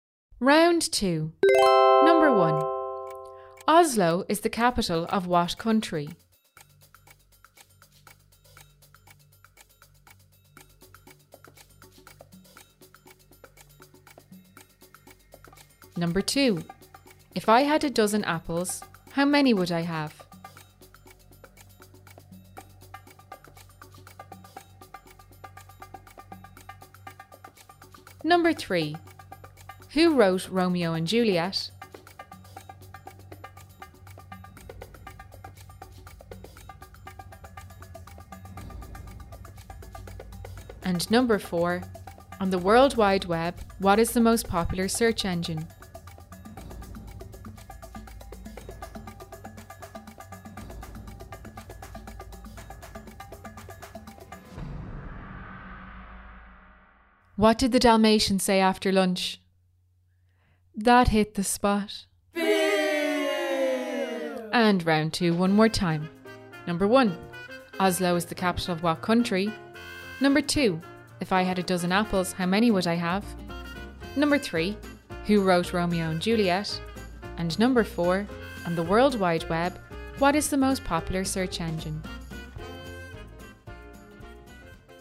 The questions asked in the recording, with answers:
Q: If I had 12 apples, how many would I have?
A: The answer is 12.